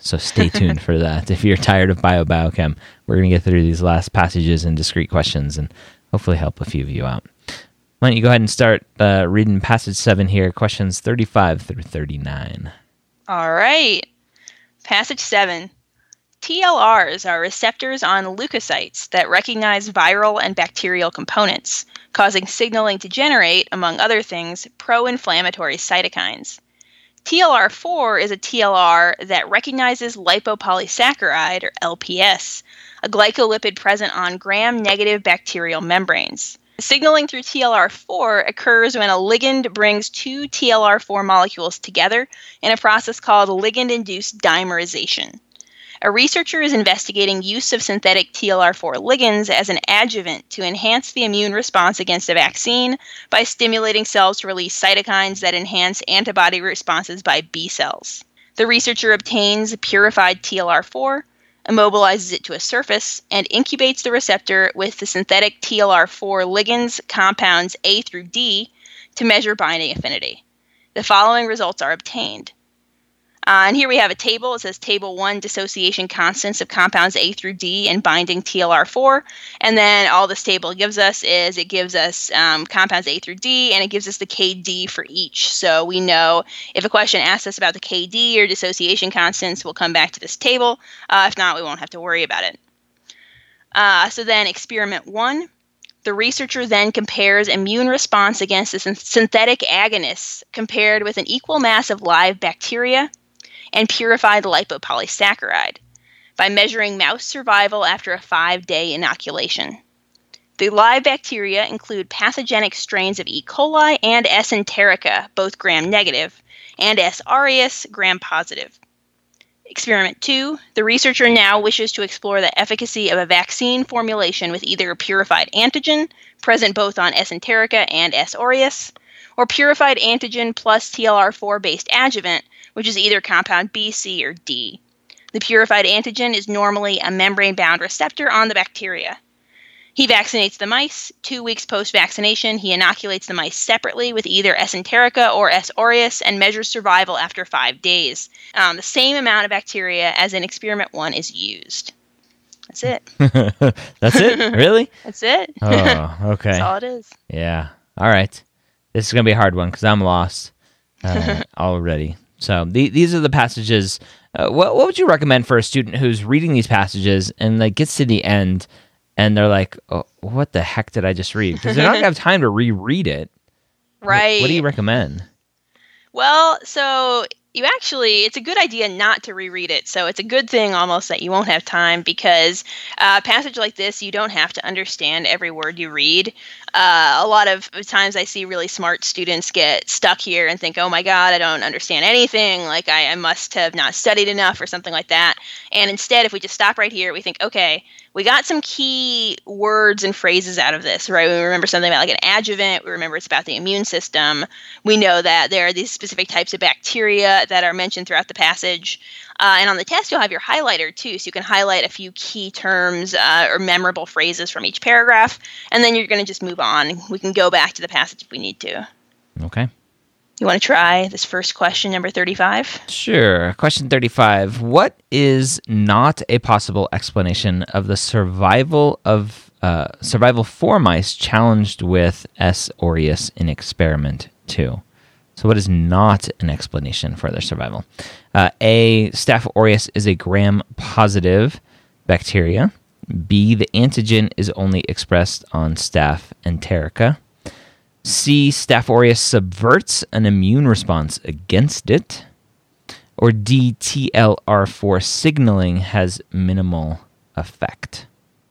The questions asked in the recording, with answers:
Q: What is not a possible explanation of the survival of survival for mice challenged with S.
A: So this one, actually, the answer is going to be B.